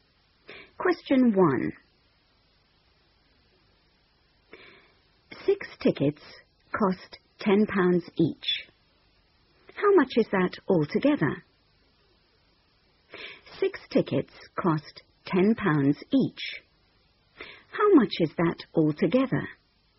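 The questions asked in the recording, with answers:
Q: 6 tickets cost £10 each. How much is that altogether?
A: £60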